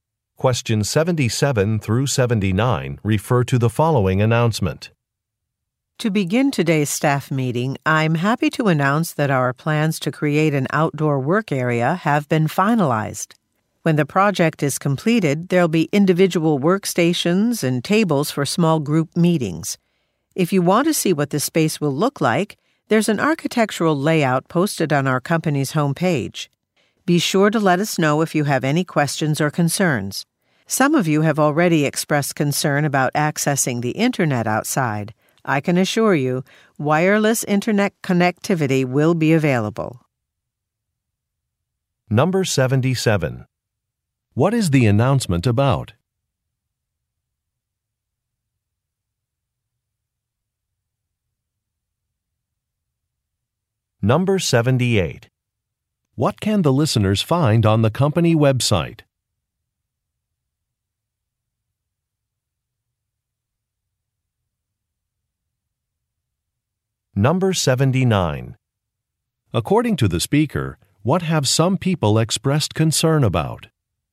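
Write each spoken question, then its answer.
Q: What is the announcement about?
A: Plans to create an outdoor work area

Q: What can the listeners find on the company website?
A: An architectural layout of the space

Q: According to the speaker, what have some people expressed concern about?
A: Accessing the internet outside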